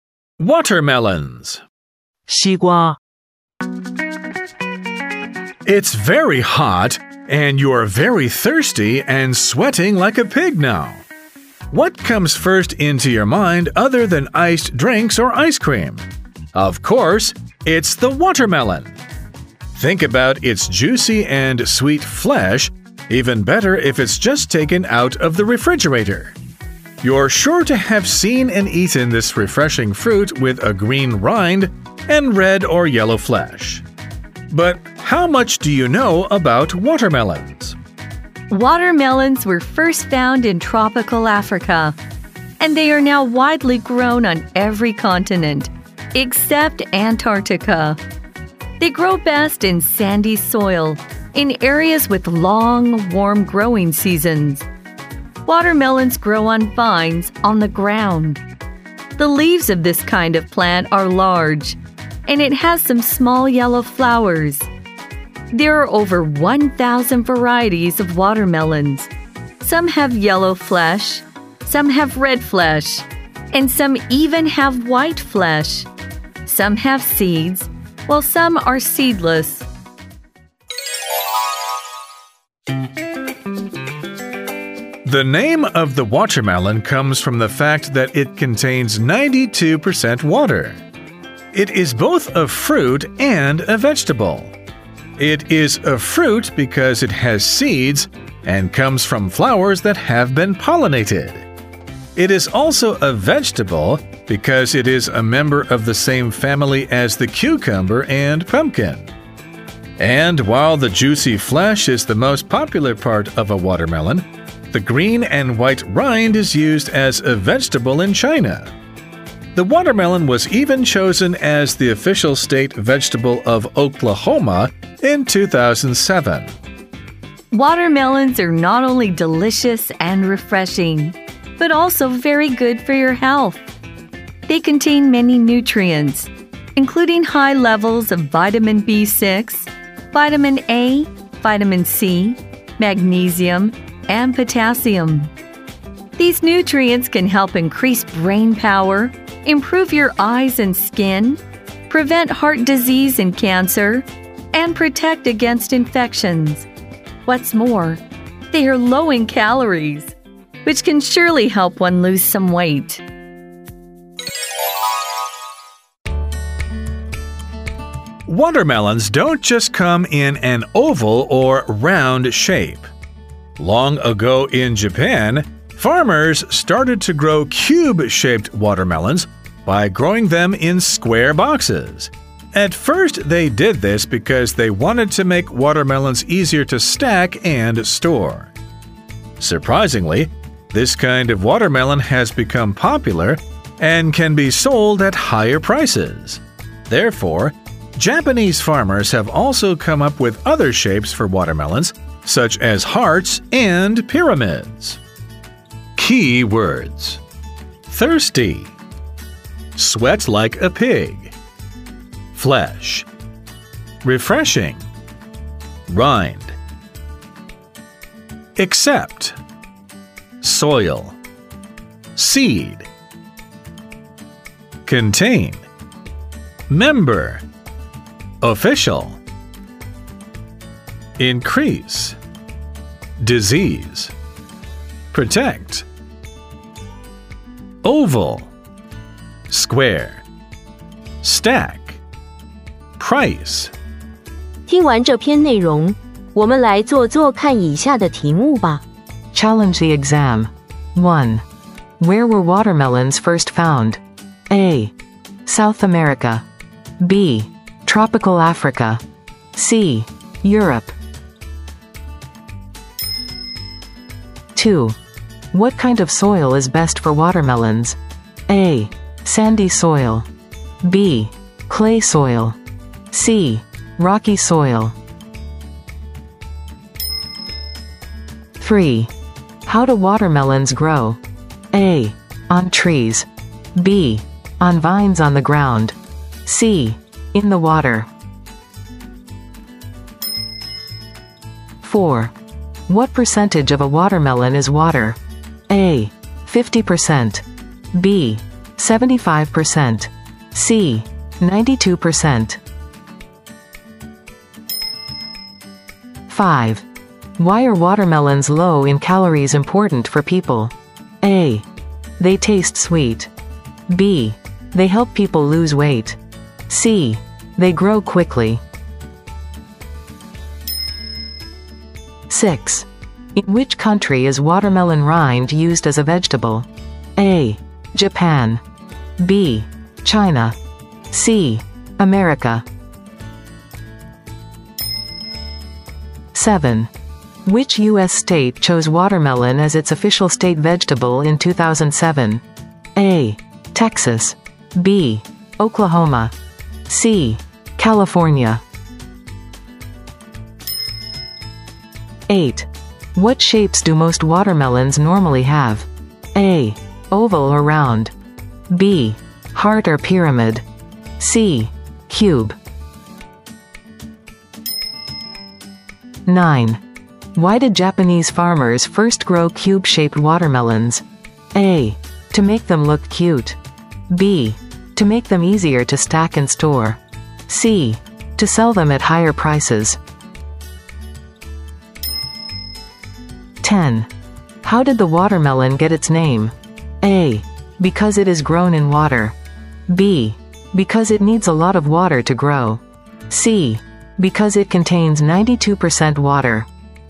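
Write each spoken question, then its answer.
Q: Where were watermelons first found?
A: B: Tropical Africa.

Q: What kind of soil is best for watermelons?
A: A: Sandy soil.

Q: How do watermelons grow?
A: B: On vines on the ground.

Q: What percentage of a watermelon is water?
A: C: 92%.

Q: Why are watermelons low in calories important for people?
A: B: They help people lose weight.

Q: In which country is watermelon rind used as a vegetable?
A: B: China.

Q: Which U.S. state chose watermelon as its official state vegetable in 2007?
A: B: Oklahoma.

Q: What shapes do most watermelons normally have?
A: A: Oval or round.

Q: Why did Japanese farmers first grow cube-shaped watermelons?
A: B: To make them easier to stack and store.

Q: How did the watermelon get its name?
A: C: Because it contains 92% water.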